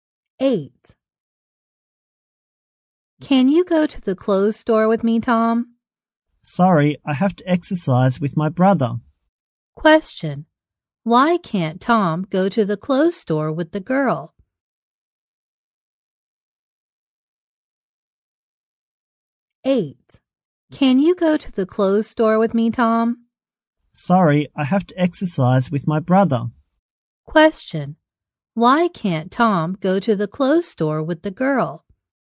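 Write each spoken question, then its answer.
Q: Why can't Tom go to the clothes store with the girl?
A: He has to exercise with his brother.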